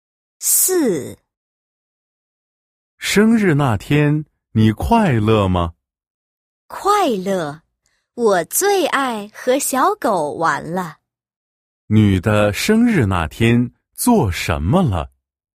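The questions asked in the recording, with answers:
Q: 女的生日那天做什么了?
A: 和小狗玩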